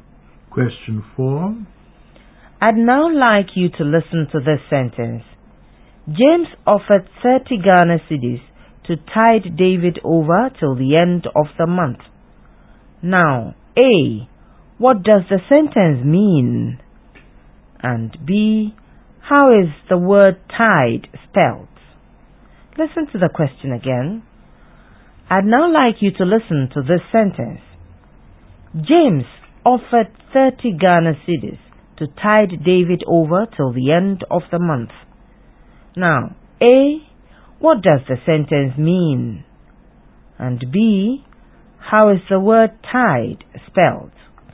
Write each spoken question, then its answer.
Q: And B. How is the word tide spelled?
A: T-I-D-E.